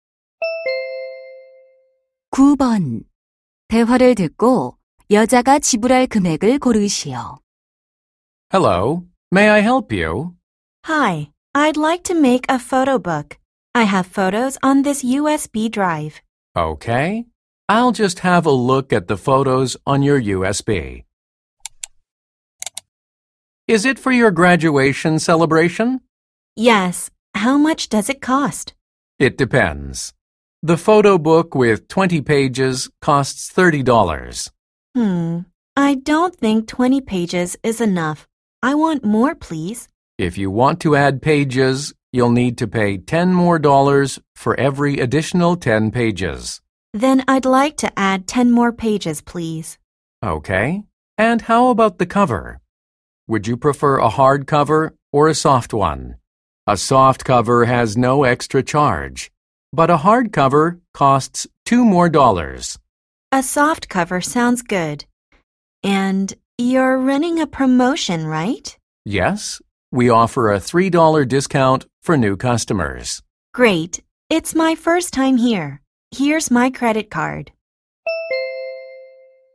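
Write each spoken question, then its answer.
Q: 대화를 듣고 여자가 지불할 금액을 고르시오.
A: $37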